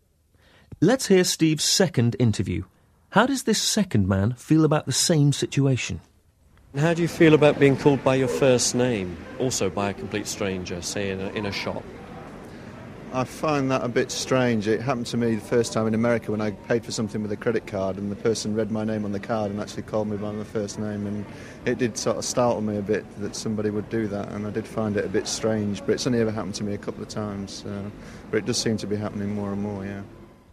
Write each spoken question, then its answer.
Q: How does this second man feel about the same situation?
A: Он говорит, что находит это несколько странным.